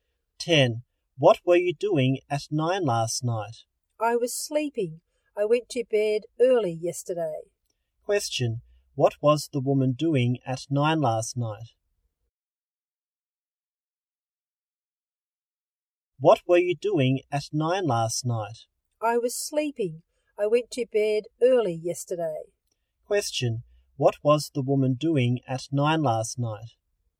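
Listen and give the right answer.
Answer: Sleeping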